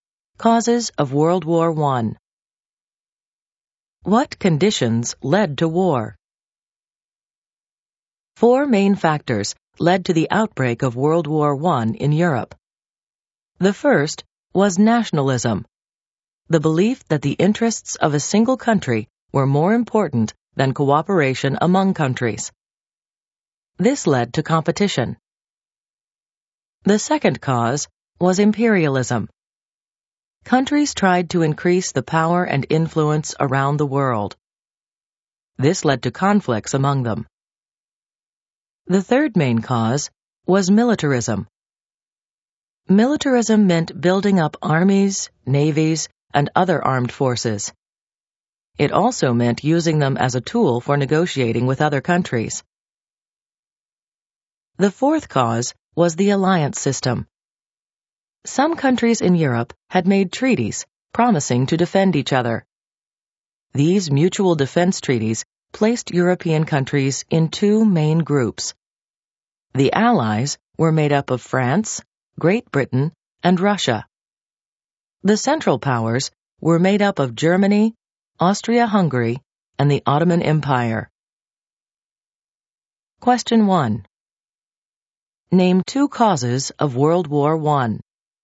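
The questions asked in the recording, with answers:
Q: Name two causes of World War I.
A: Any two of: nationalism, imperialism, militarism, the alliance system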